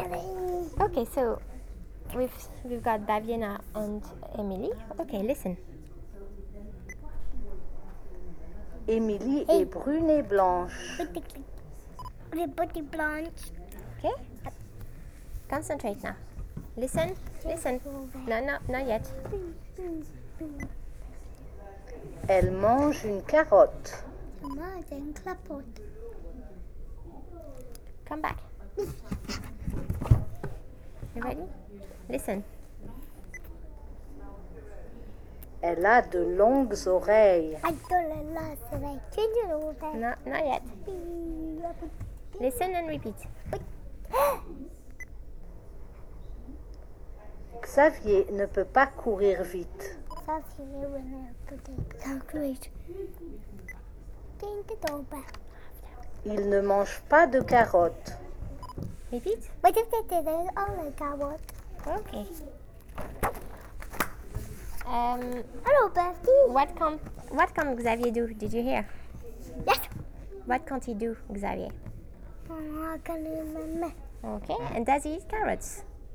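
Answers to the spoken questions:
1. Run fast
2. No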